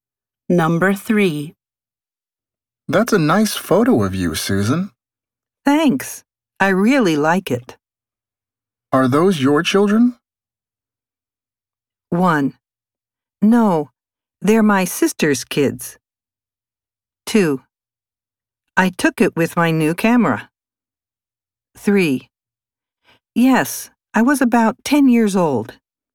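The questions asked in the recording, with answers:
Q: Are those your children?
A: 1: No, they're my sister's kids.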